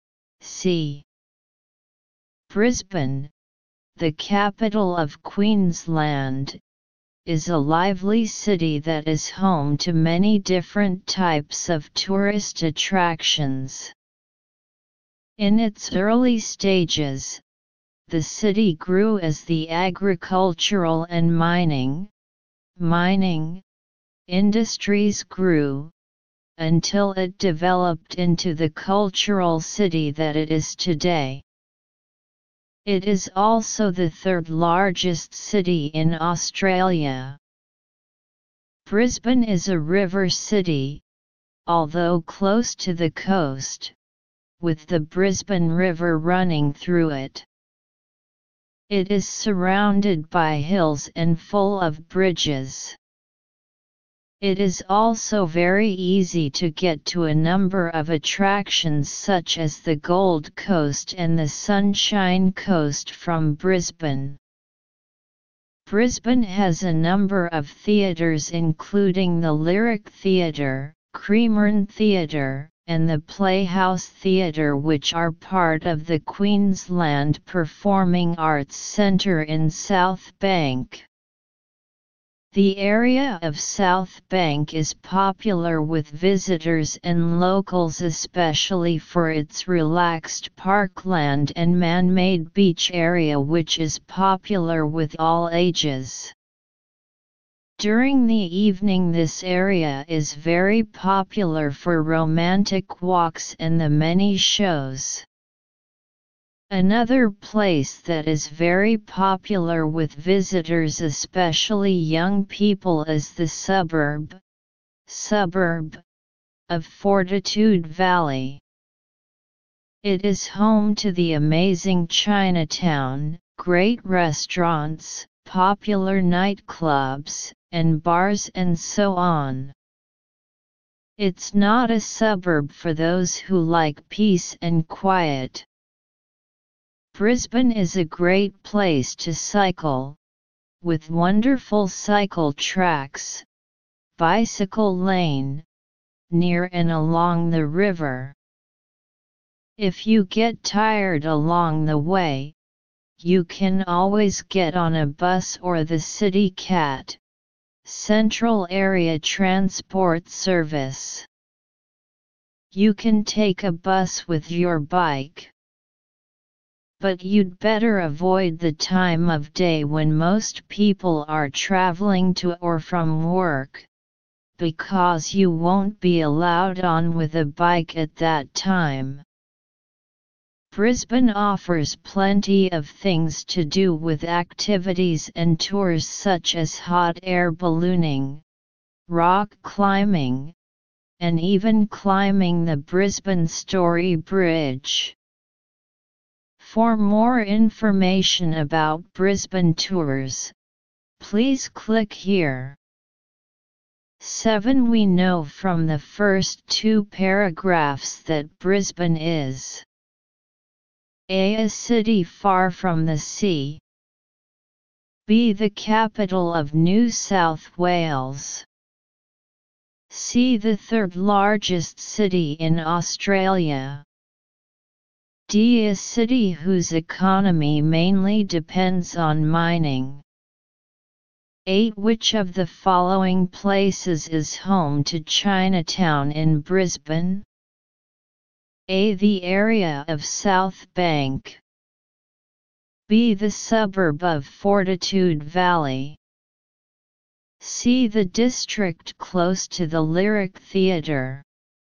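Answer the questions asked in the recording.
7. C: The third largest city in Australia.
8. B: The suburb of Fortitude Valley.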